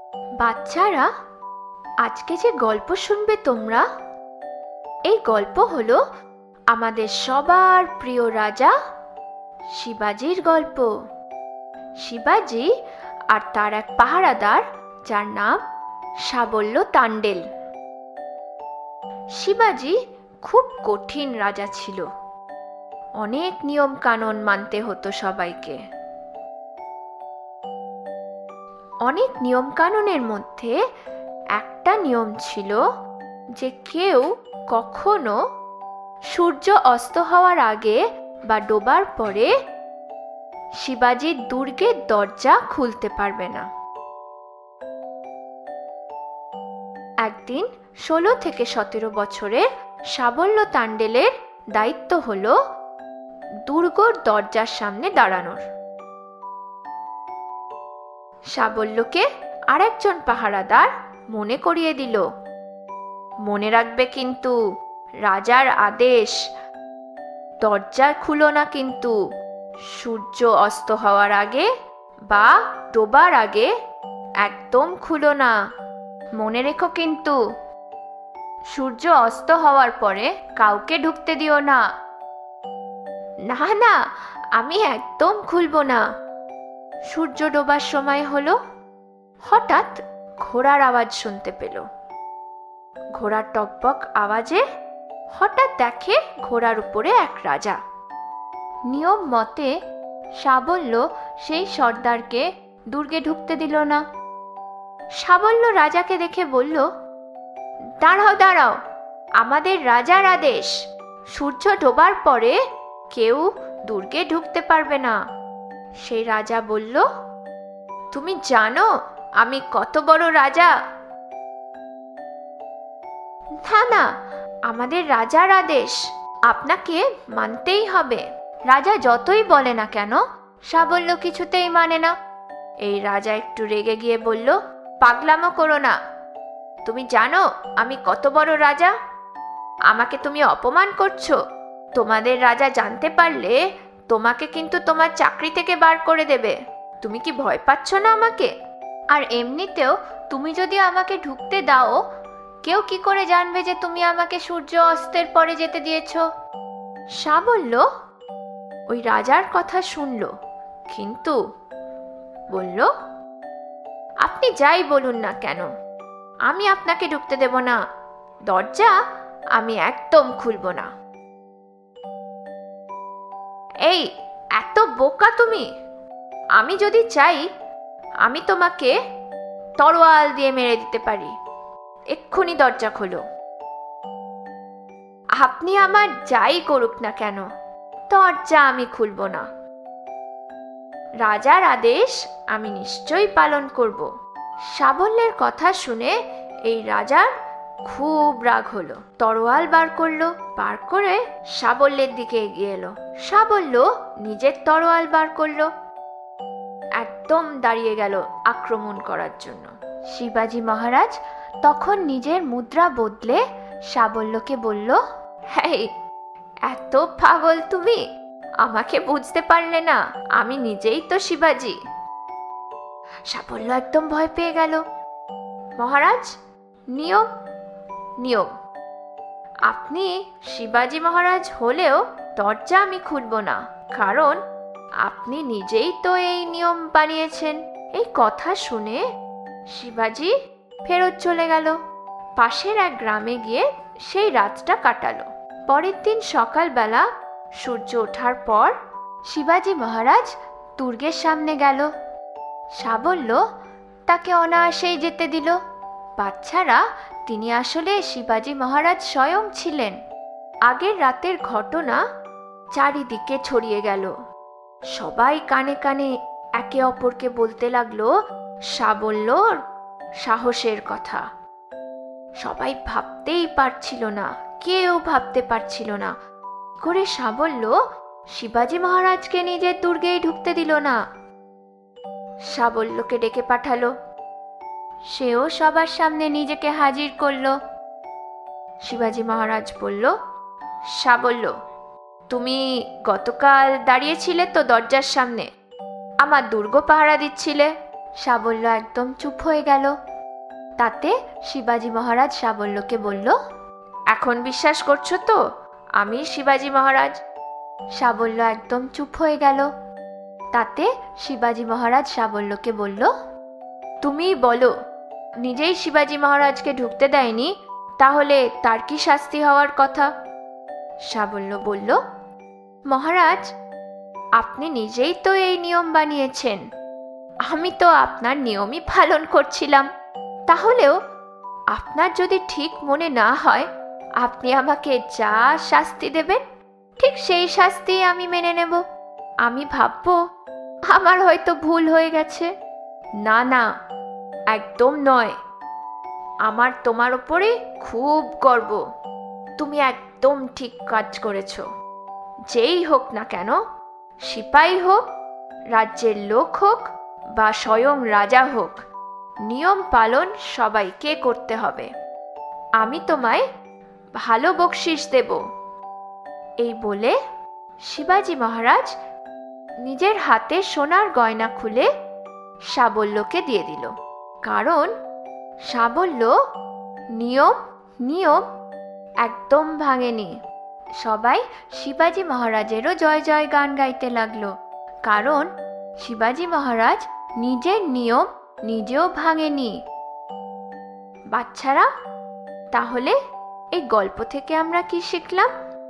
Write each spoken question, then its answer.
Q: বাচ্চারা, তাহলে এই গল্প থেকে আমরা কি শিখলাম?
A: যে কোনো নিয়ম যেই বানাক না কেন পালন করো। যদি নিজেও কোনো নিয়ম বানিয়ে থাকো তাহলে সেটা নিজেদের জন্যও উপযোগ করো।